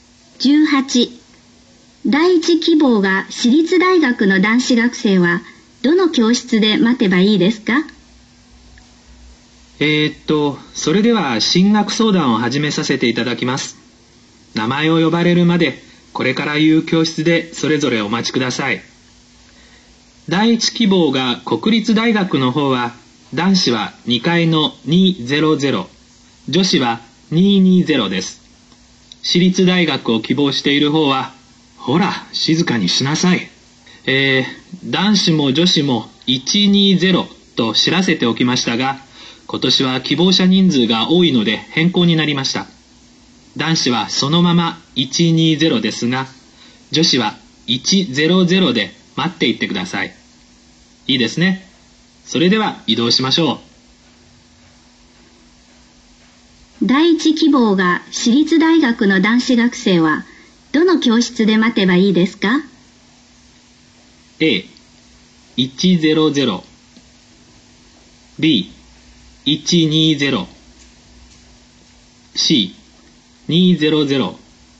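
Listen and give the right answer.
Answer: B: 120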